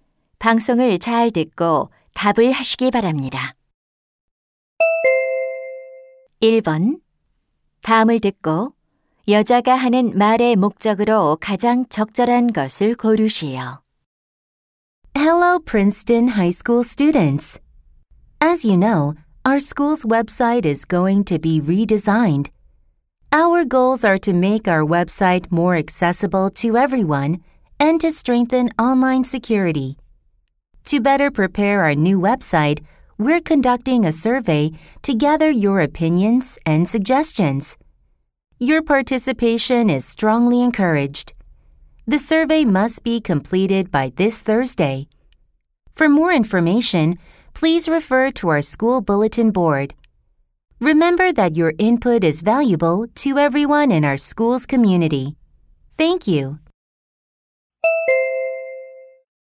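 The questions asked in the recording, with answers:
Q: 다음을 듣고 여자가 하는 말의 목적으로 가장 적절한 것을 고르시오.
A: 학교 웹사이트 개편을 위한 설문 조사 참여를 독려하려고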